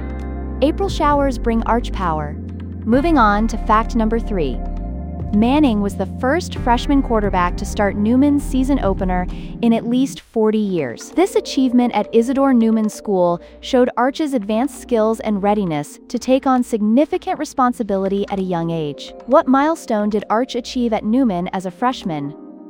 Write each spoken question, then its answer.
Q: What milestone did Arch achieve at Newman as a freshman?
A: Correct answer, first freshman QB to start in 40 years.